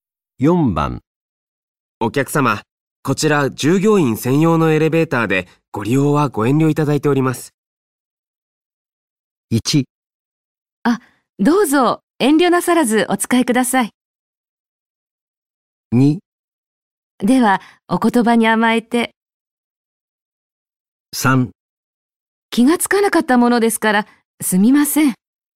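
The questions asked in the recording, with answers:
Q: お客様、こちら従業員専用のエレベーターでご利用はご遠慮いただいております。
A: 3: 気がつかなかったものですから、すみません。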